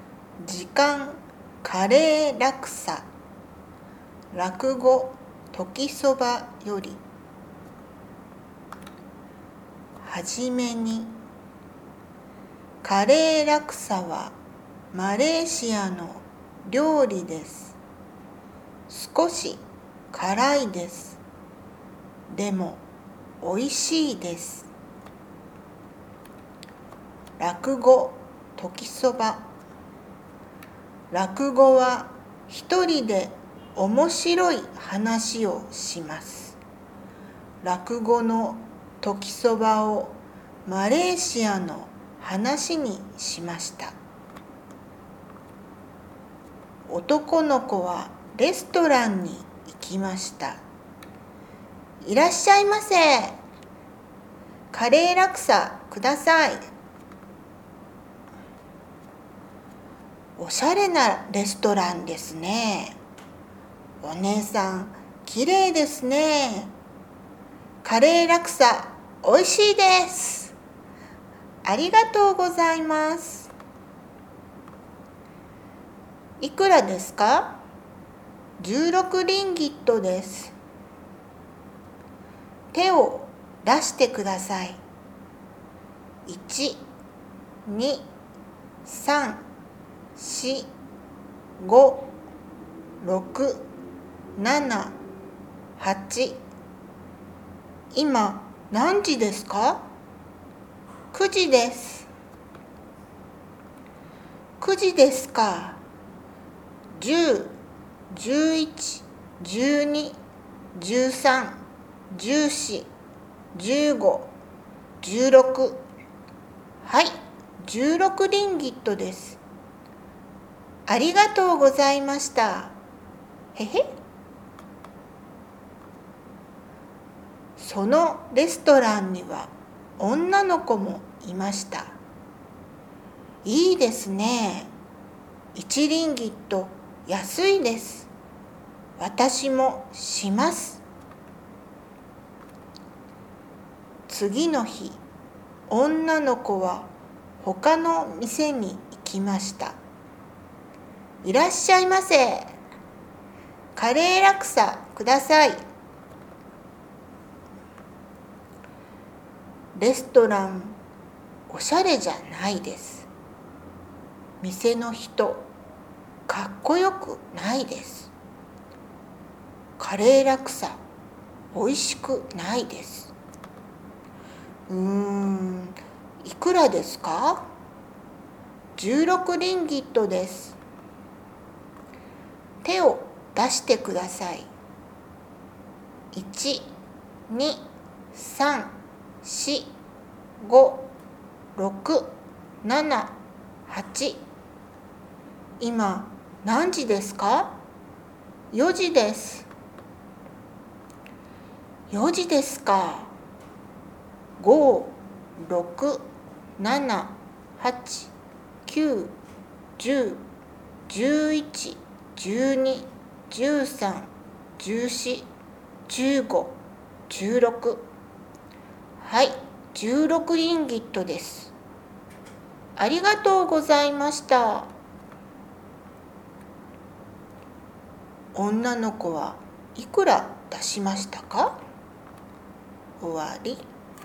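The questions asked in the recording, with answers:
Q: 女の子はいくら出しましたか?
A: 20リンギット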